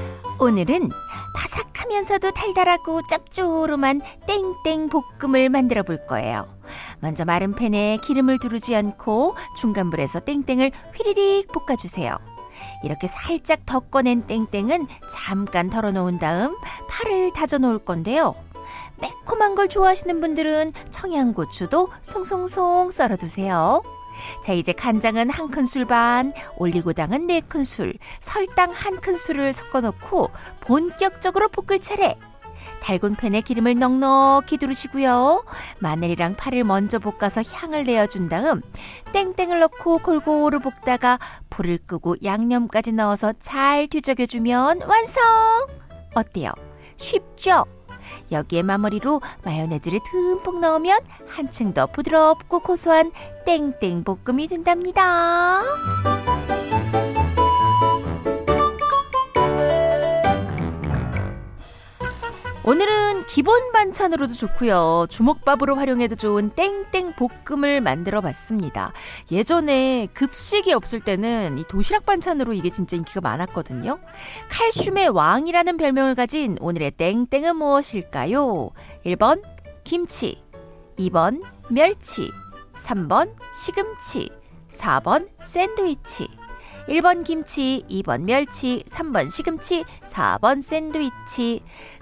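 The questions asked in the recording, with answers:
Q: 칼슘의 왕이라는 별명을 가진 오늘의 땡땡은 무엇일까요?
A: 2: 멸치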